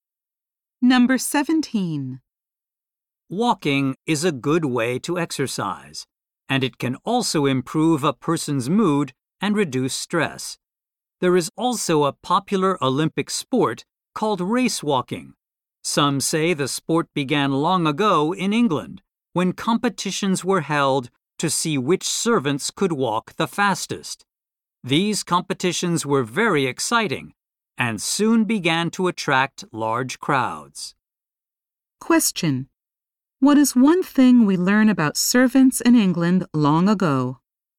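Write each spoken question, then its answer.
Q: What is one thing we learn about servants in England long ago?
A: They competed to see who could walk the fastest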